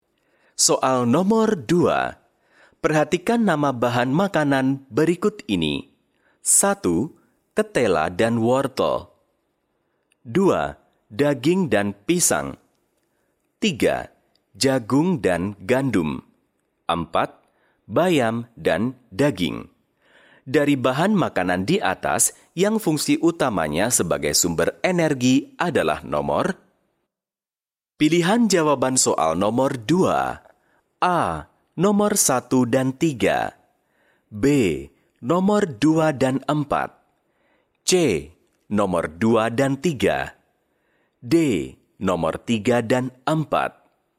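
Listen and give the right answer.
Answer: A: Nomor 1 dan 3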